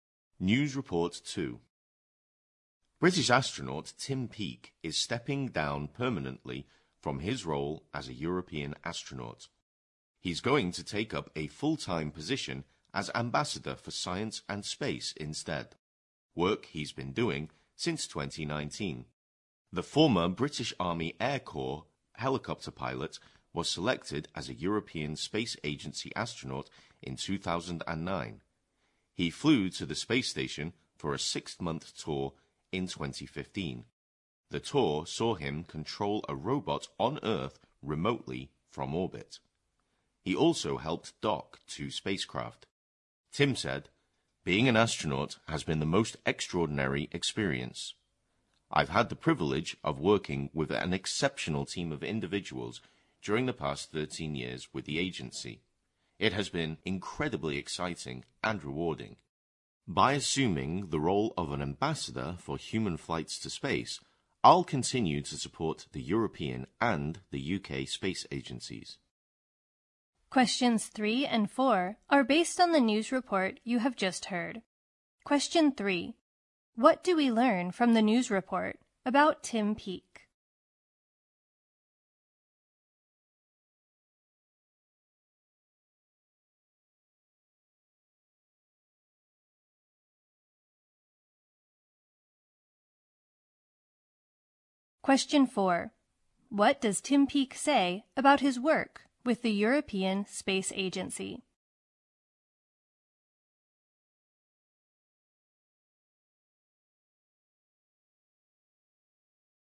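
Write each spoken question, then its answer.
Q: What do we learn from the news report about Tim Peake?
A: He is stepping down as a European astronaut to become Ambassador for Science and Space

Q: What does Tim Peake say about his work with the European Space Agency?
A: It has been incredibly exciting and rewarding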